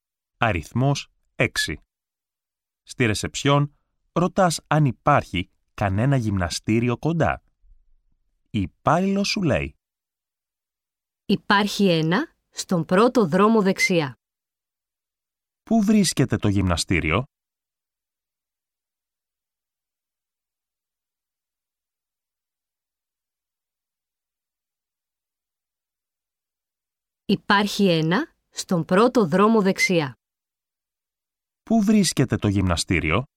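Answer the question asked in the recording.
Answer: Στον πρώτο δρόμο δεξιά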